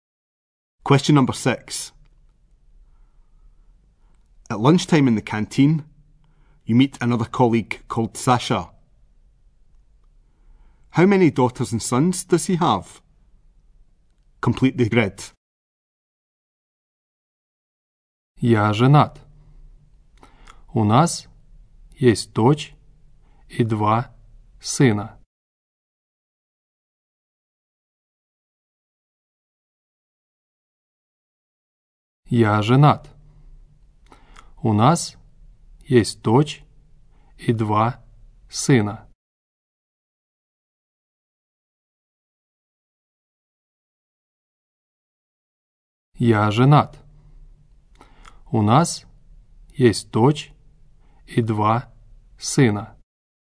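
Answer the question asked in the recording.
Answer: One daughter and two sons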